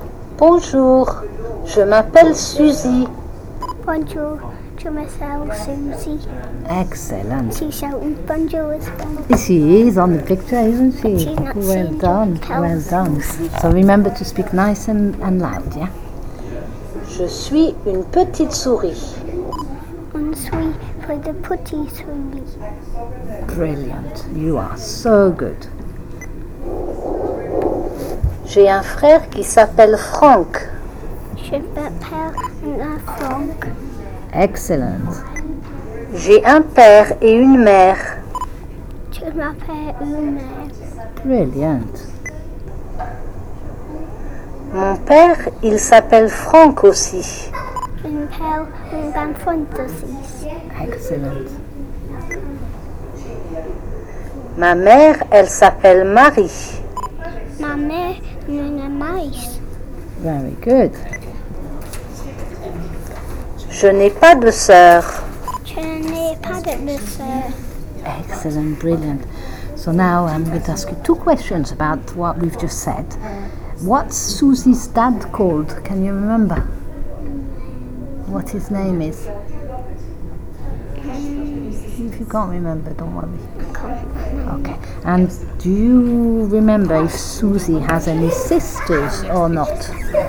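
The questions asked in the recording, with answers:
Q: What's Susie's dad called?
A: Franck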